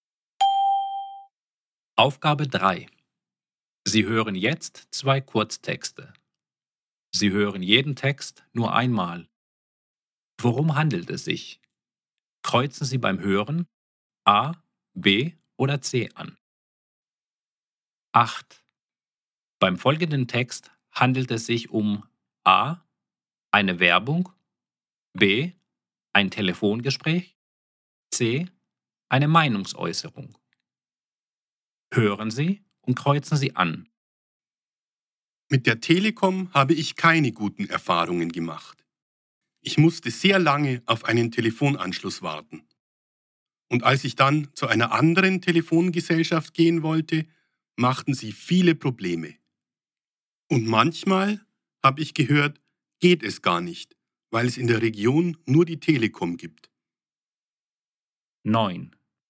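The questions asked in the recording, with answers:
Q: Beim folgenden Text handelt es sich um A, eine Werbung, B, ein Telefongespräch, C, eine Meinungsäußerung.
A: C: eine Meinungsäußerung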